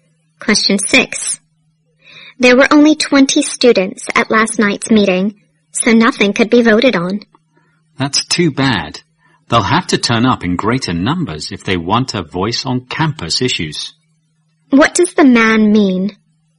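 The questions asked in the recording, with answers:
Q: What does the man mean?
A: More students must come to meetings if they want a say on campus issues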